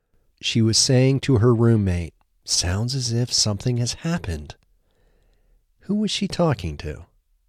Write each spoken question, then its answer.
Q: Who was she talking to?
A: She was talking to her roommate.